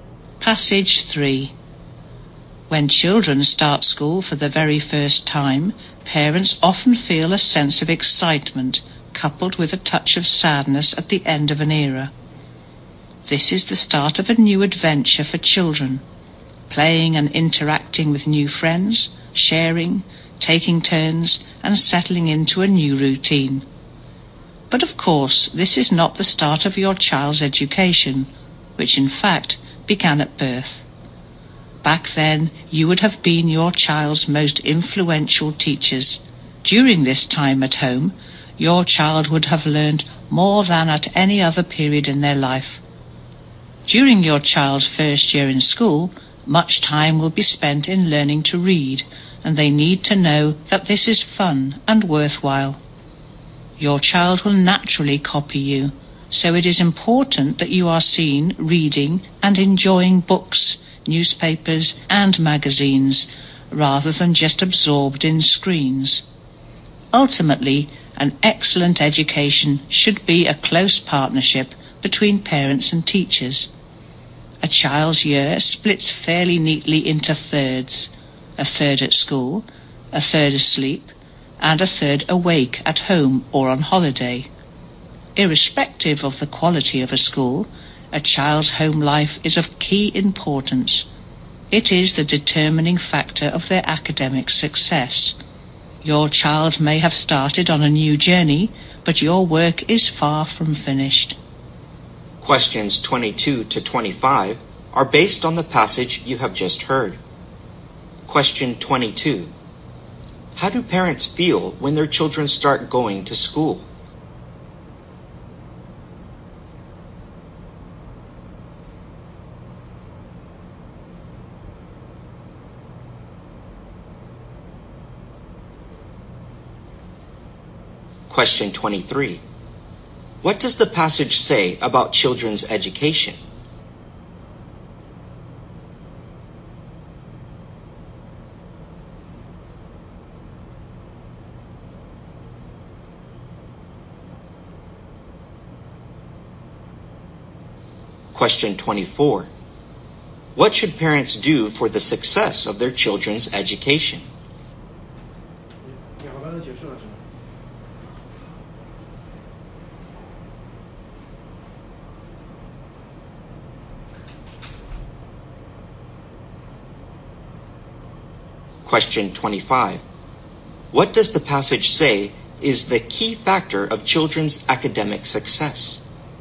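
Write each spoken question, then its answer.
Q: How do parents feel when their children start going to school?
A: Excited, with a touch of sadness

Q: What does the passage say about children's education?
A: It begins at birth

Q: What does the passage say is the key factor of children's academic success?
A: The child's home life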